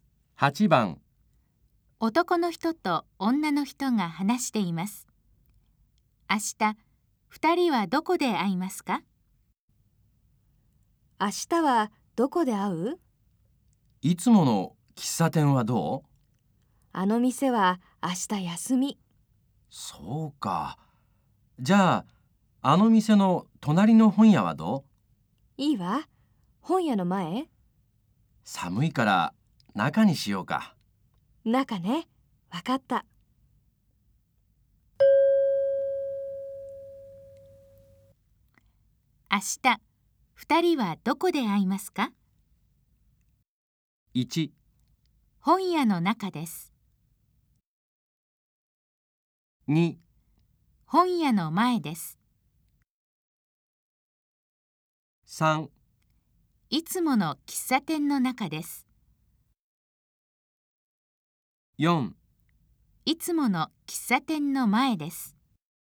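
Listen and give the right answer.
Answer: 1: 本屋の中です。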